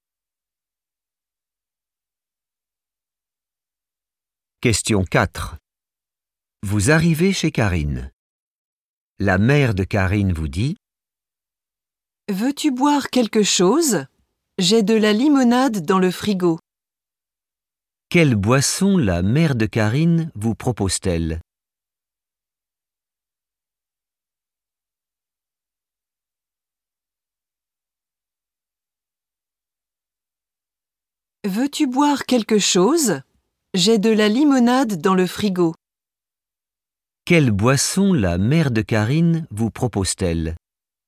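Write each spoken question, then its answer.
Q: Quelle boisson la mère de Karine vous propose-t-elle?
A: de la limonade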